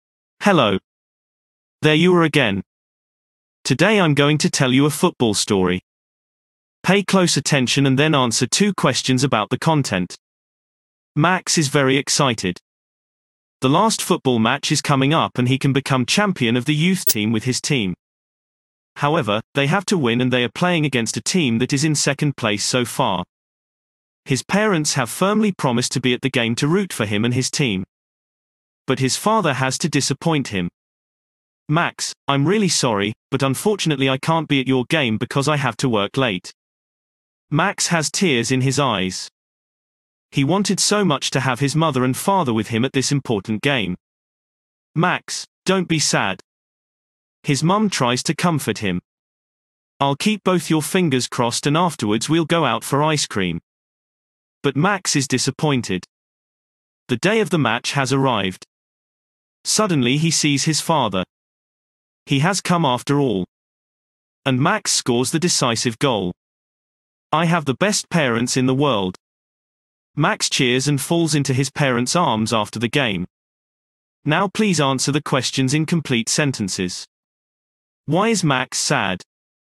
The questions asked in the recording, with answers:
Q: Why is Max sad?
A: Max is sad because his father can't come to his football match.